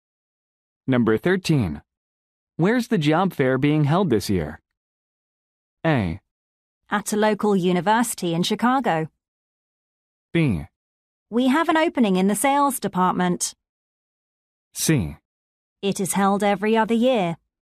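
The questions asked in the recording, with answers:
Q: Where's the job fair being held this year?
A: A: At a local university in Chicago.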